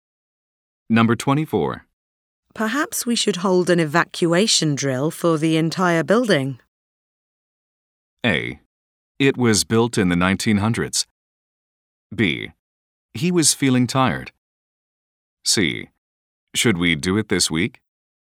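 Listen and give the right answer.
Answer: C: Should we do it this week?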